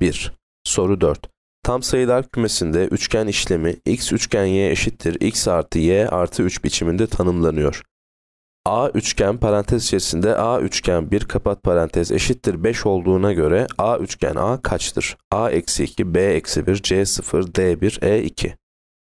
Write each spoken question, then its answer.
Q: A üçgen parantez içerisinde A üçgen 1 kapat parantez eşittir 5 olduğuna göre A üçgen A kaçtır?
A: Yanıt D 1.